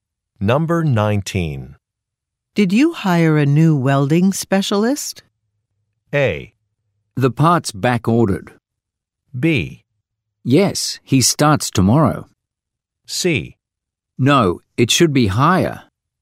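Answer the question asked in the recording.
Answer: B: Yes, he starts tomorrow.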